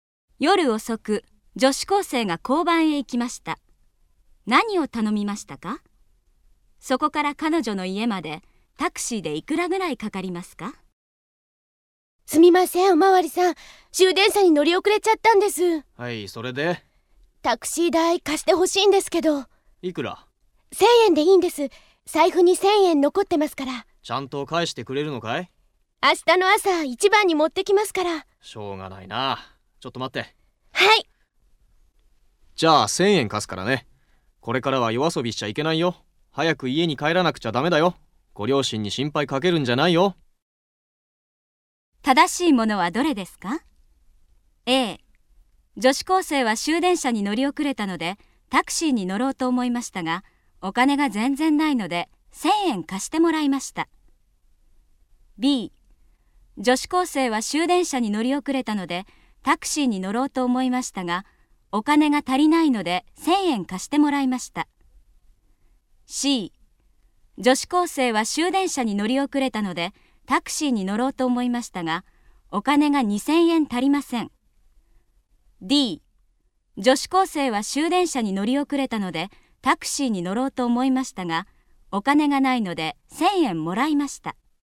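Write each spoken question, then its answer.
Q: 何を頼みましたか?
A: タクシー代を貸してほしいと頼みました

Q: そこから彼女の家までタクシーでいくらぐらいかかりますか?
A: 2000円ぐらい

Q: 正しいものはどれですか?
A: B: 女子高生は終電車に乗り遅れたのでタクシーに乗ろうと思いましたが、お金が足りないので1000円貸してもらいました。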